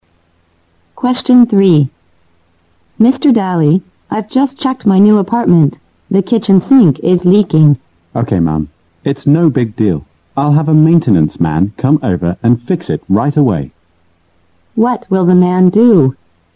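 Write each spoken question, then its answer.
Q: What will the man do?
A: Send a maintenance man to fix the leaking sink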